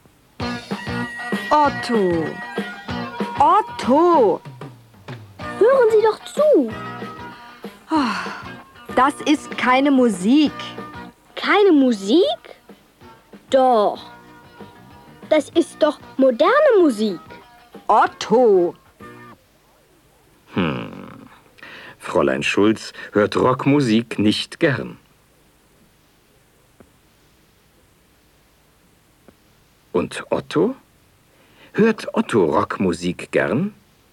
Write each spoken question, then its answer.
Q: Und Otto? Hört Otto Rockmusik gern?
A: Ja, er hört Rockmusik gern.